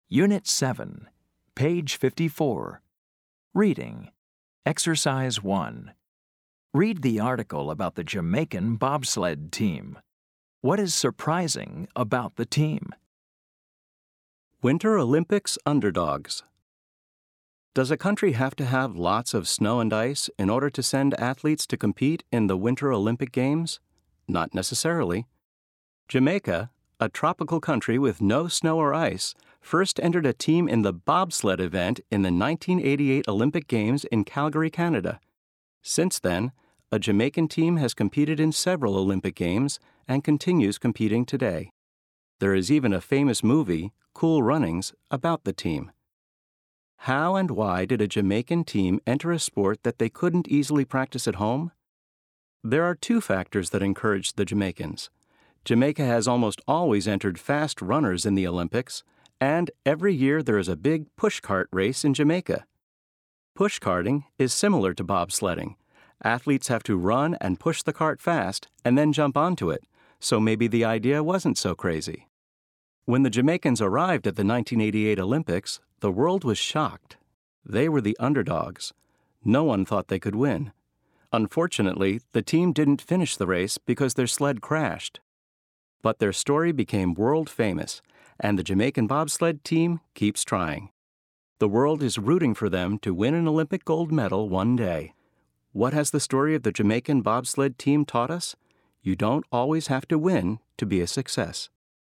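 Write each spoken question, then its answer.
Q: What is surprising about the team?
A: Jamaica is a tropical country with no snow or ice, yet it sends a bobsled team to the Winter Olympics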